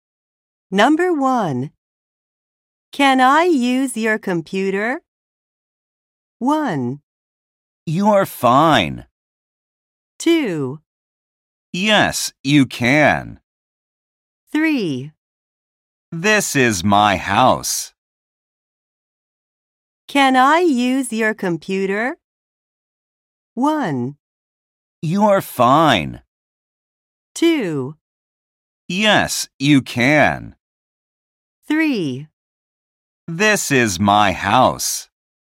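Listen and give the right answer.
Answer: 2: Yes, you can.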